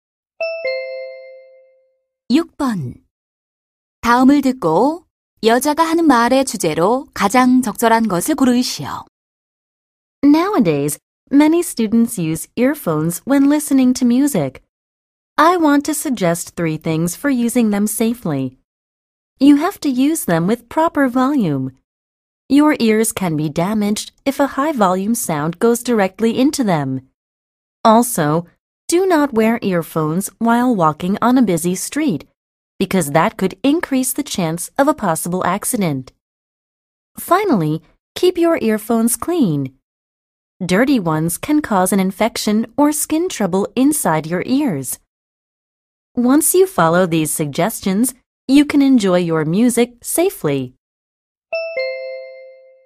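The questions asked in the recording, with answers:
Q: 다음을 듣고 여자가 하는 말의 주제로 가장 적절한 것을 고르시오.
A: 이어폰을 안전하게 사용하는 방법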